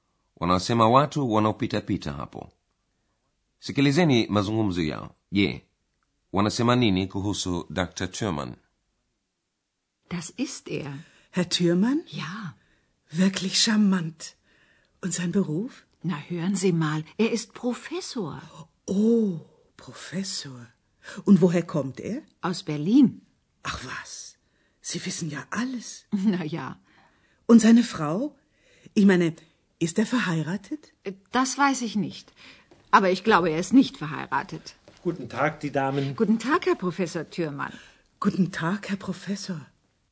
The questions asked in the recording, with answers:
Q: Je, wanasema nini kuhusu Dr.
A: Mabibi hawa wawili wamempandisha cheo Dr.